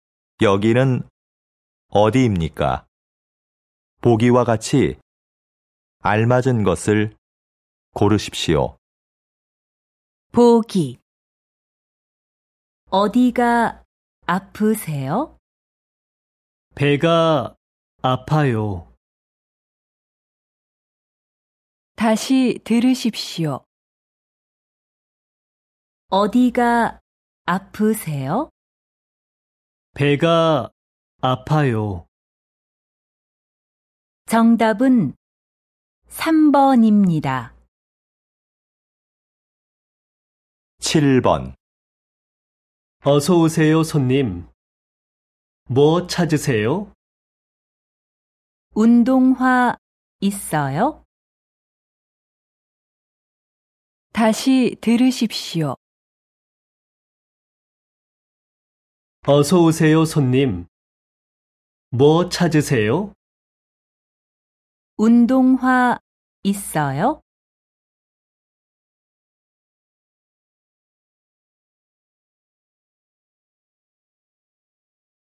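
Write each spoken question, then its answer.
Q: 여기는 어디입니까?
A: 신발 가게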